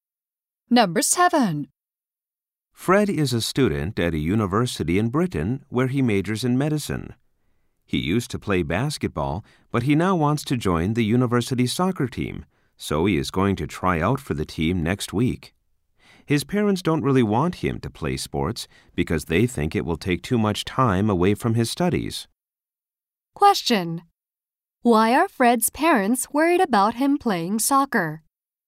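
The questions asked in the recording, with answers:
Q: Why are Fred's parents worried about him playing soccer?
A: They think it will take too much time away from his studies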